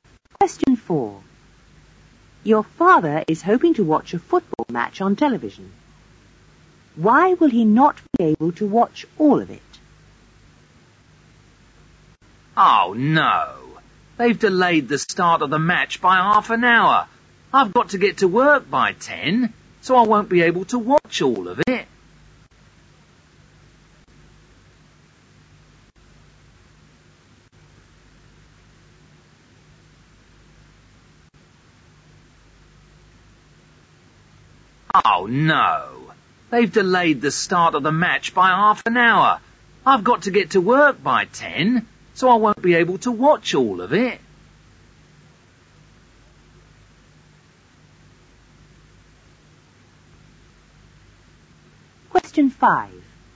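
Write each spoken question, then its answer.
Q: Why will he not be able to watch all of it?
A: The start was delayed by half an hour and he has to be at work by 10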